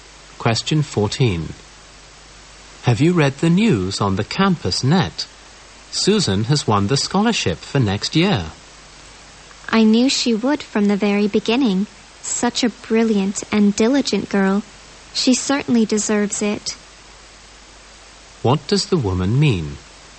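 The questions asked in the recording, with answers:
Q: What does the woman mean?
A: Susan deserves the scholarship; she expected her to win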